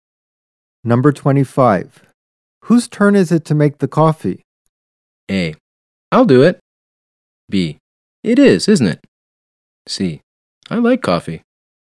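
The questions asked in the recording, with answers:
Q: Whose turn is it to make the coffee?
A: A: I'll do it.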